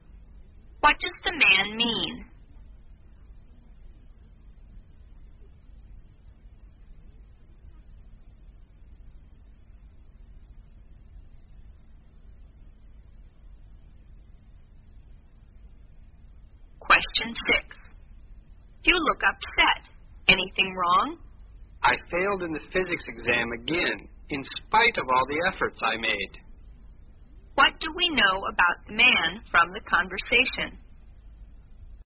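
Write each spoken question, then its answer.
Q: What do we know about the man from the conversation?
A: He failed the physics exam again despite working hard.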